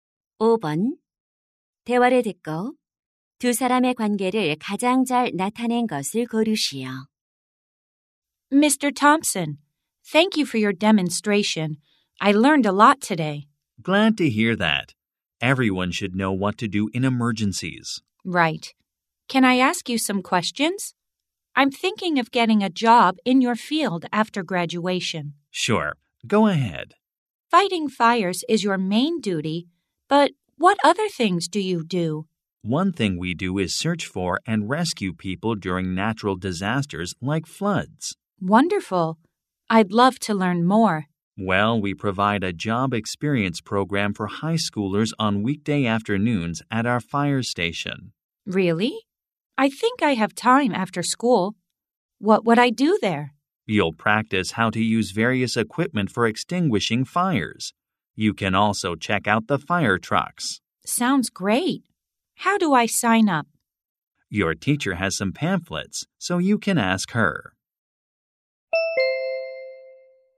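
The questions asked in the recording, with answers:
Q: 대화를 듣고 두 사람의 관계를 가장 잘 나타낸 것을 고르시오.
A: 소방관 - 고등학생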